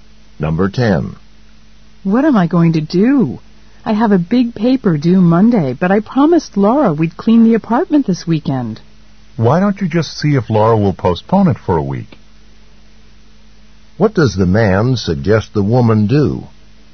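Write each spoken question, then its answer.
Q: What does the man suggest the woman do?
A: Ask Laura to put off the cleaning for a week.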